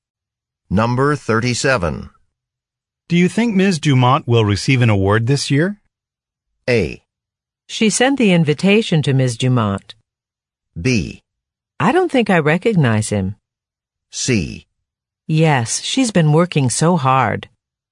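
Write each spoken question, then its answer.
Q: Do you think Ms. Dumont will receive an award this year?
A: C: Yes, she's been working so hard.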